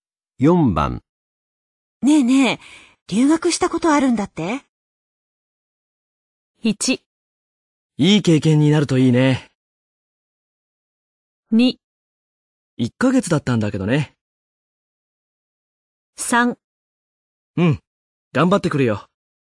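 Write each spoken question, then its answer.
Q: ねえねえ、留学したことあるんだって?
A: 2: 1ヶ月だったんだけどね。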